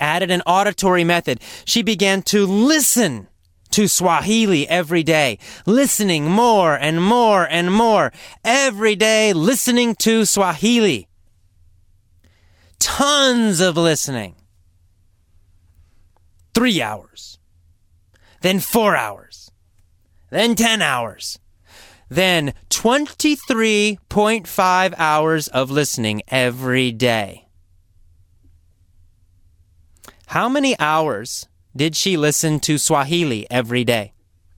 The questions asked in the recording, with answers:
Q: How many hours did she listen to Swahili every day?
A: 23.5.